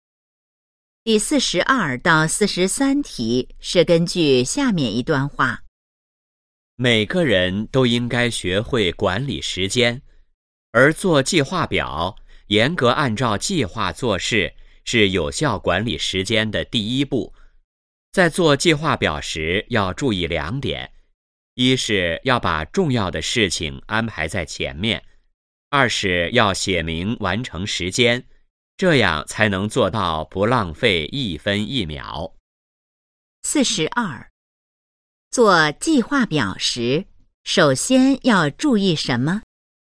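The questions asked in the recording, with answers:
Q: 做计划表时,首先要注意什么?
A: 把重要的事情安排在前面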